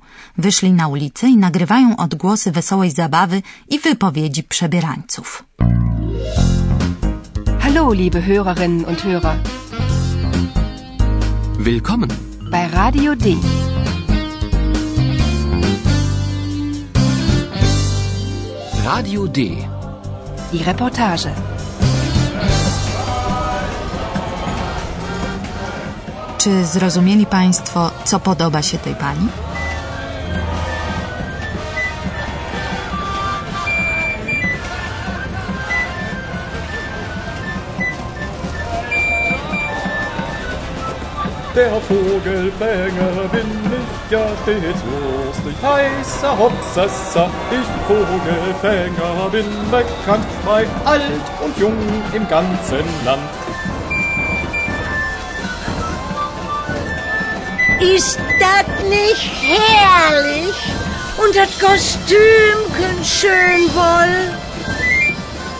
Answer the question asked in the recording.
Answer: Tej pani najbardziej podoba się kostium, a mówiąc ściślej, kostium upstrzony ptasimi piórami